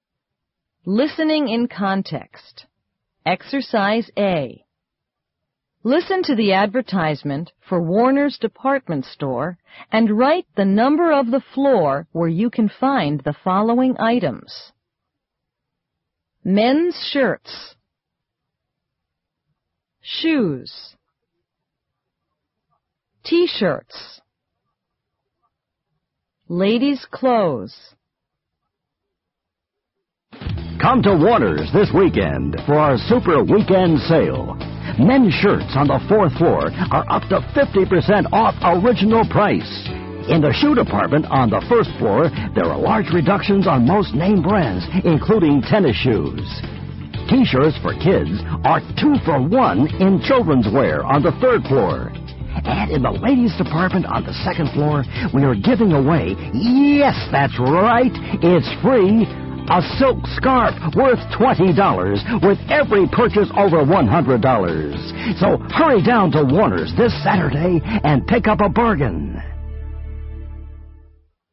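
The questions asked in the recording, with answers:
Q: Men's shirts.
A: fourth floor

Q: Shoes.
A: first floor

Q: T-shirts.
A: third floor

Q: Ladies' clothes.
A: second floor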